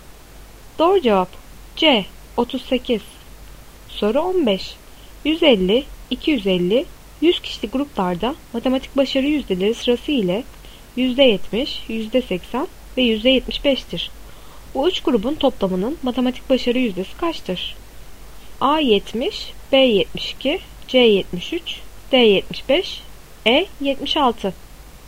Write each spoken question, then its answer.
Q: Bu üç grubun toplamının matematik başarı yüzdesi kaçtır?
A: Doğru cevap E 76.